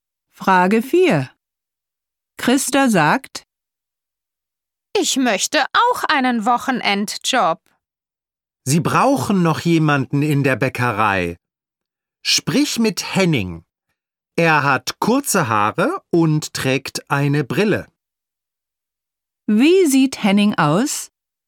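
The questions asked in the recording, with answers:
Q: Wie sieht Henning aus?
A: Er hat kurze Haare und trägt eine Brille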